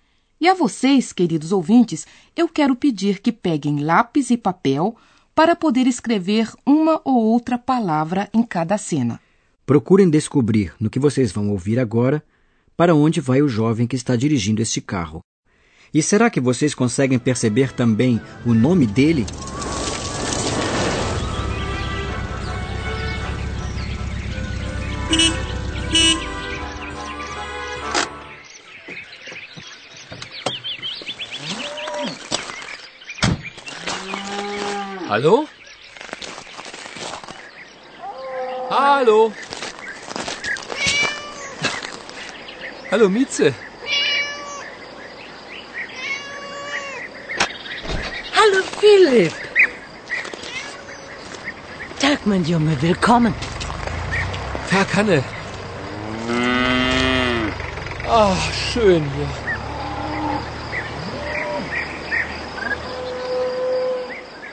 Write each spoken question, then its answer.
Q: E será que vocês conseguem perceber também o nome dele?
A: o rapaz se chama Philip